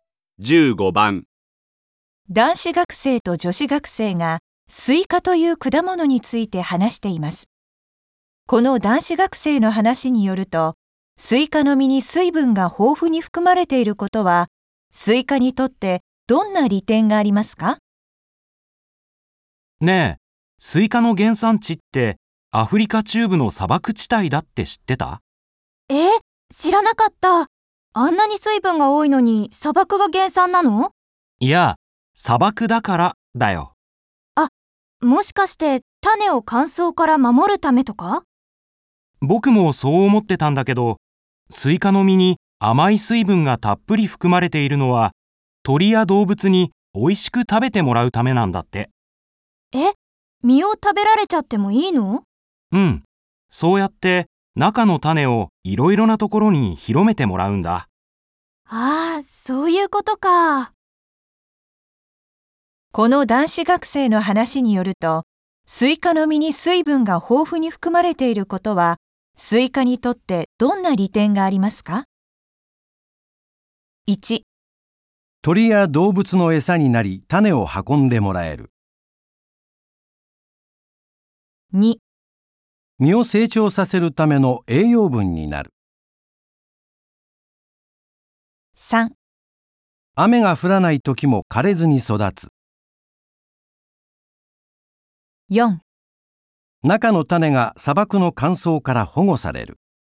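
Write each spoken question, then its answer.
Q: この男子学生の話によると、スイカの実に水分が豊富に含まれていることは、スイカにとってどんな利点がありますか?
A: 1: 鳥や動物の餌になり、種を運んでもらえる。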